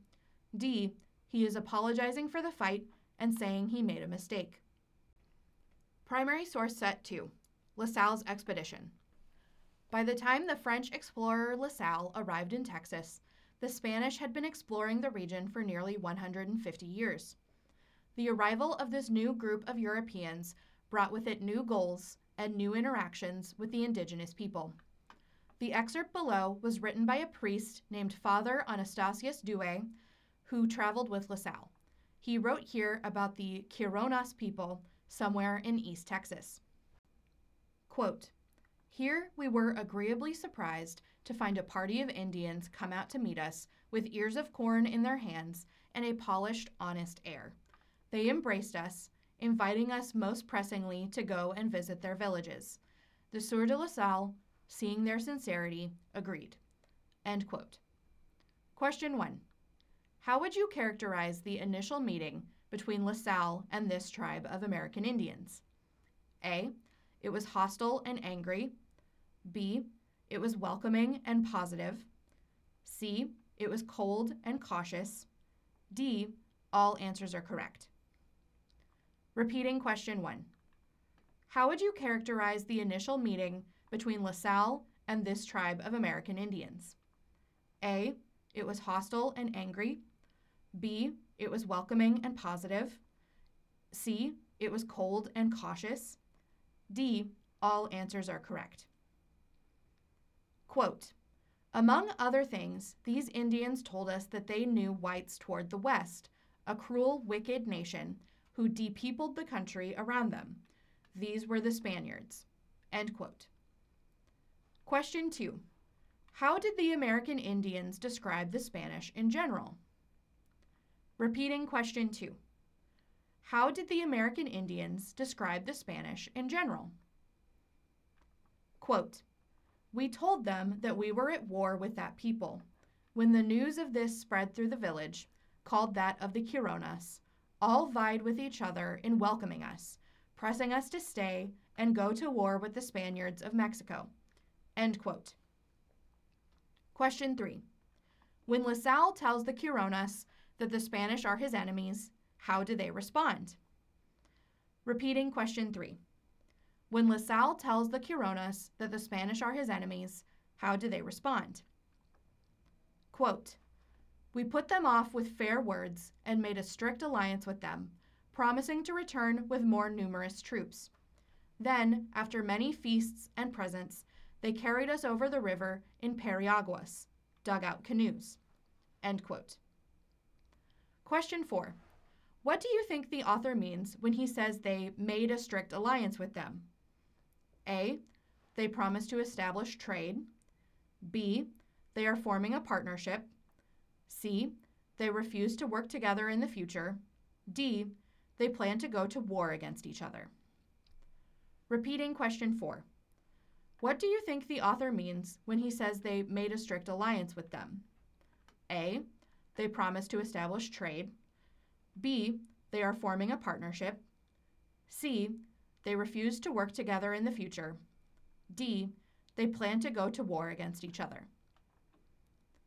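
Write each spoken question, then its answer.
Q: How would you characterize the initial meeting between La Salle and this tribe of American Indians?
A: B: It was welcoming and positive.

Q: How did the American Indians describe the Spanish in general?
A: As a cruel, wicked nation who depeopled the country around them

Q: When La Salle tells the Kironas that the Spanish are his enemies, how do they respond?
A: They welcome them eagerly and press them to stay and go to war with the Spaniards of Mexico

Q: What do you think the author means when he says they made a strict alliance with them?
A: B: They are forming a partnership.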